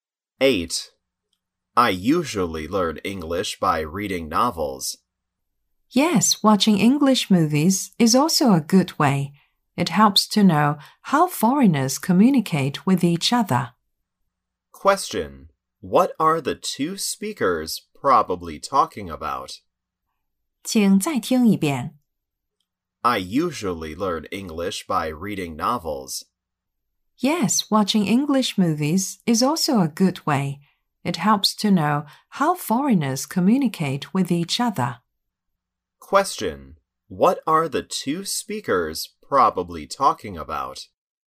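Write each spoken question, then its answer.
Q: What are the two speakers probably talking about?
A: Ways of learning English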